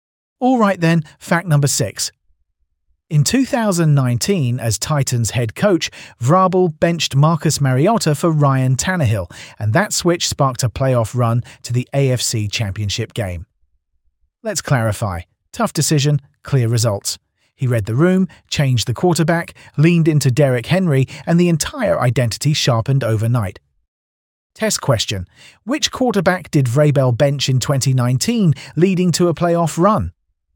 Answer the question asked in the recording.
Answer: Correct answer, Marcus Mariota.